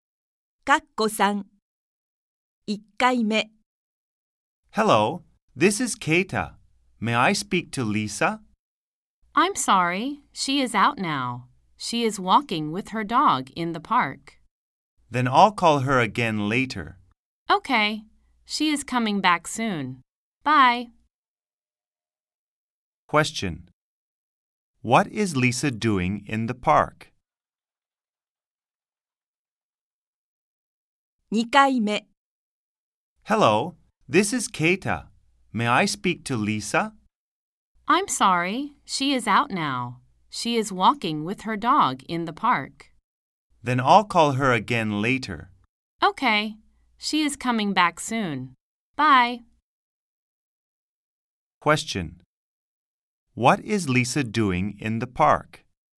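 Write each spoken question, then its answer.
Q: Question. What is Lisa doing in the park?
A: She is walking with her dog.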